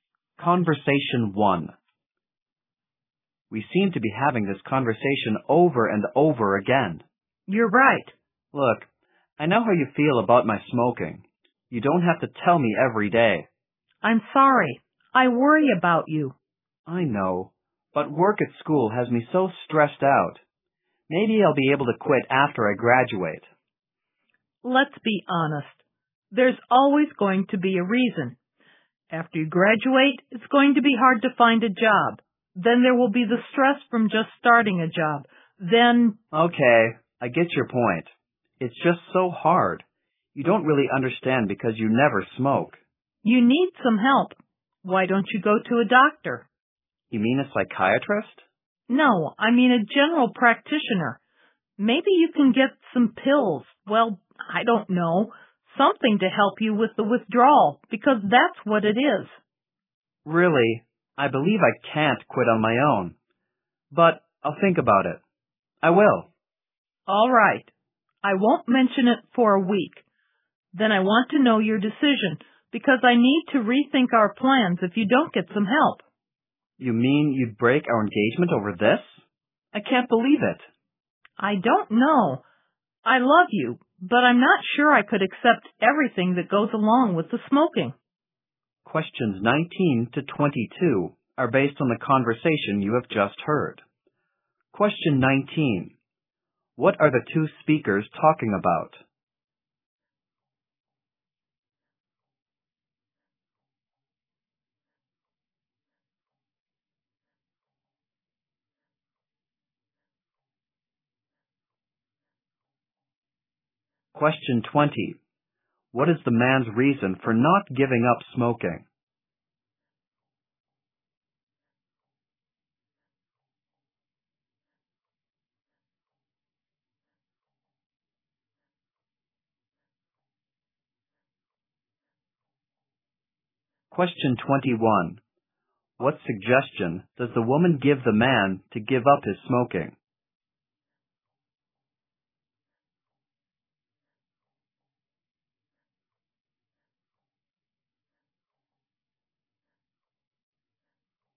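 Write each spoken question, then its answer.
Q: What are the two speakers talking about?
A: The man's smoking

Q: What is the man's reason for not giving up smoking?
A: Stress from schoolwork

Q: What suggestion does the woman give the man to give up his smoking?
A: Go to a general practitioner for pills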